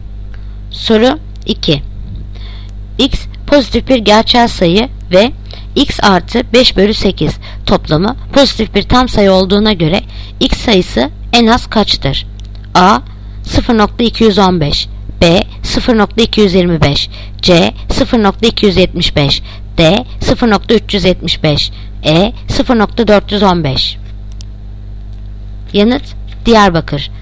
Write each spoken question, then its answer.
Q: X pozitif bir gerçel sayı ve X artı 5/8 toplamı pozitif bir tam sayı olduğuna göre X sayısı en az kaçtır?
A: Yanıt Diyarbakır. 0.375.